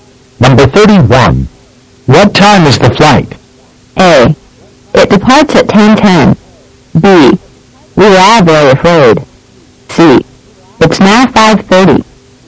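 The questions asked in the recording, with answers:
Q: What time is the flight?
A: A: It departs at 10:10.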